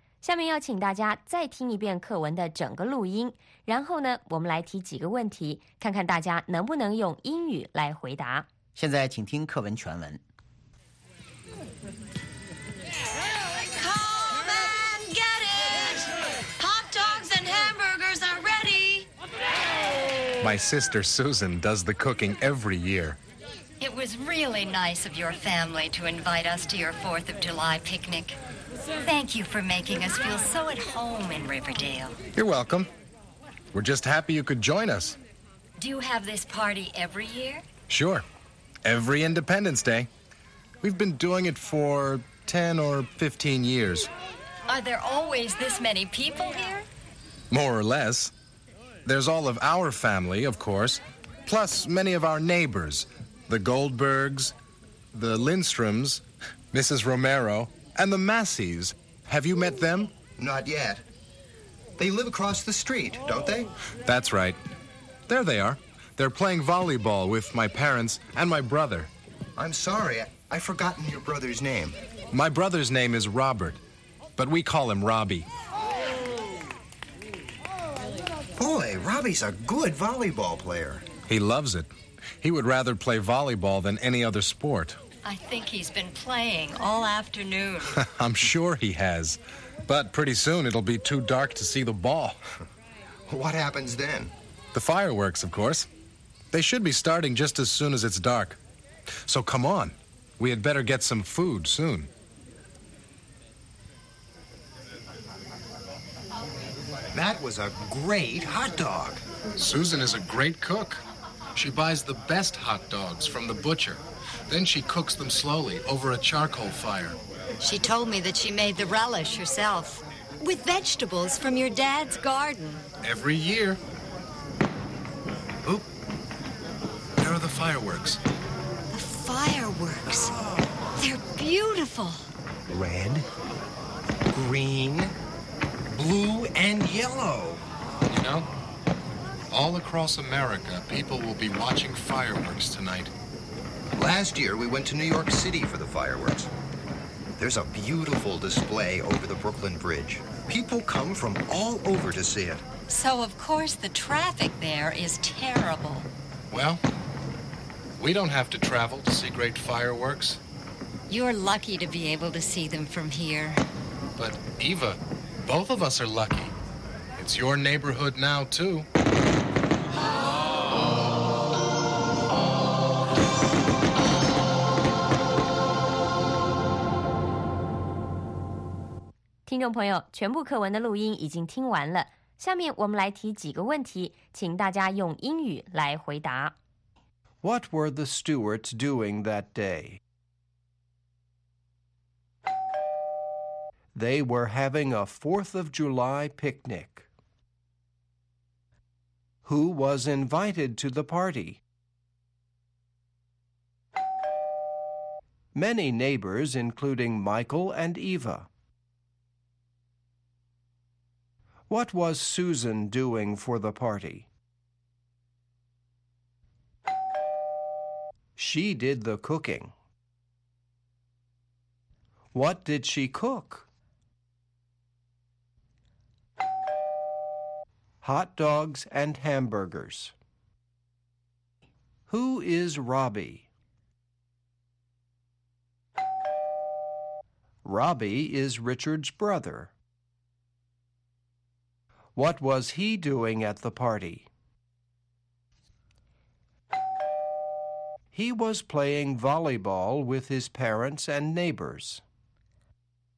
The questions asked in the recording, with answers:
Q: What were the Stewarts doing that day?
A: They were having a 4th of July picnic.

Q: Who was invited to the party?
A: Many neighbors, including Michael and Eva.

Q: What was Susan doing for the party?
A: She did the cooking.

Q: What did she cook?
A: Hot dogs and hamburgers.

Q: Who is Robbie?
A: Robbie is Richard's brother.